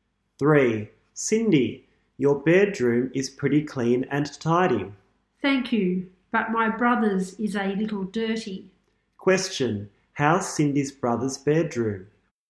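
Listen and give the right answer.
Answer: A little dirty.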